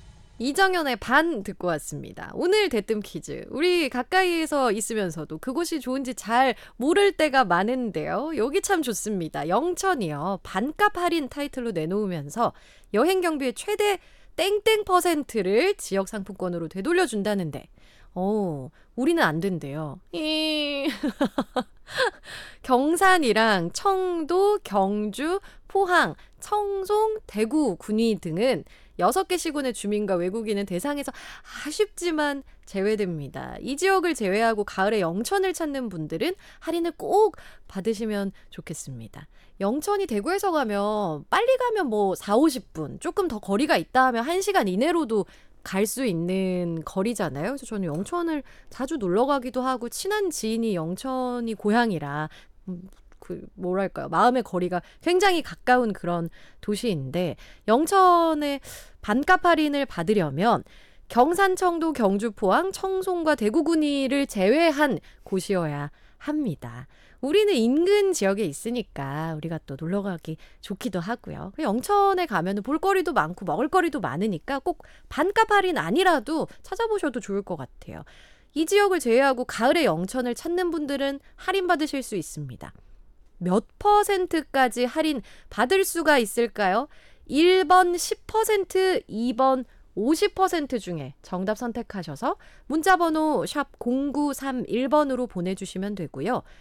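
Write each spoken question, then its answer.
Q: 몇 퍼센트까지 할인 받을 수가 있을까요?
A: 2: 50%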